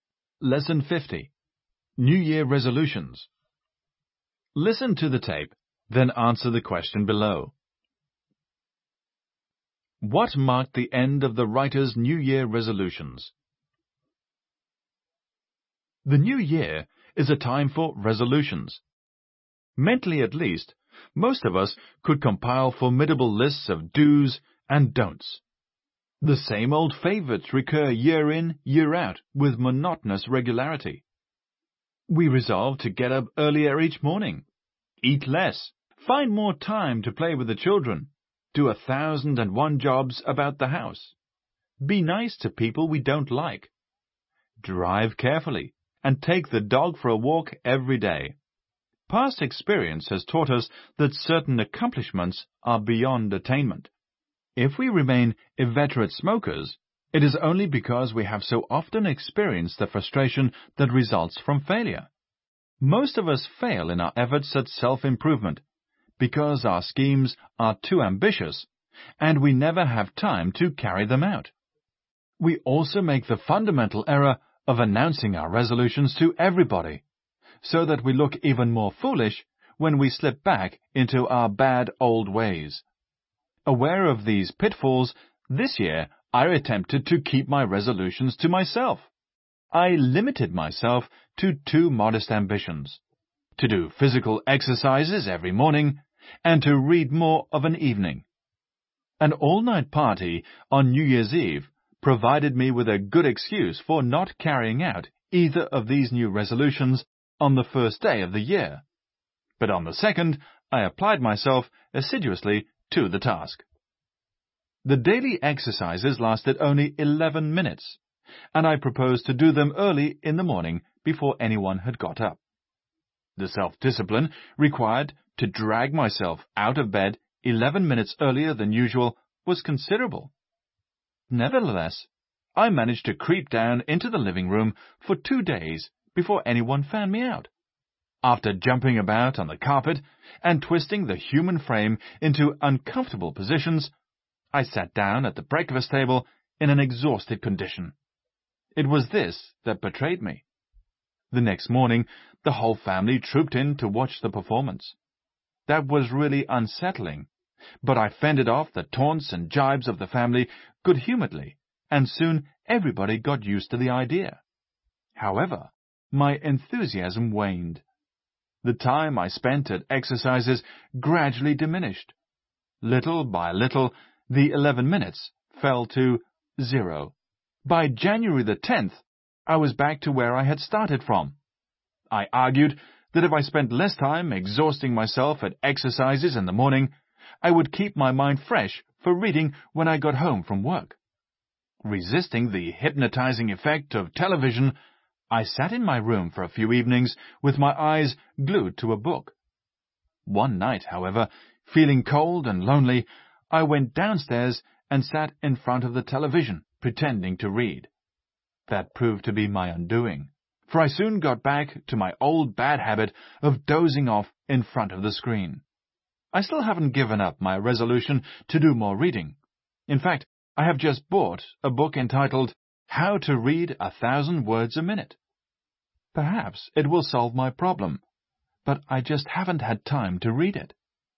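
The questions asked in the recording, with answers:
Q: What marked the end of the writer's New Year resolutions?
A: He gave up exercising by January 10th and went back to dozing in front of the television instead of reading.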